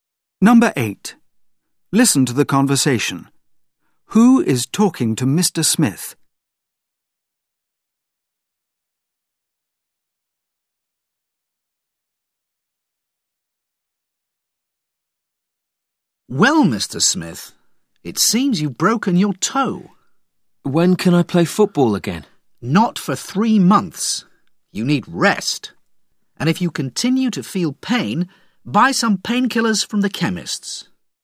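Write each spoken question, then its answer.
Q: Who is talking to Mr. Smith?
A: A doctor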